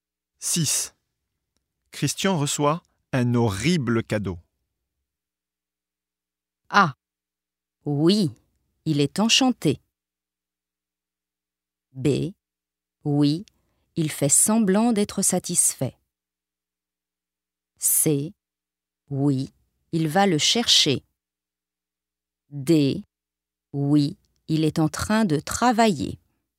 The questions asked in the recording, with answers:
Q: Christian reçoit un horrible cadeau.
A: B. Oui, il fait semblant d'être satisfait.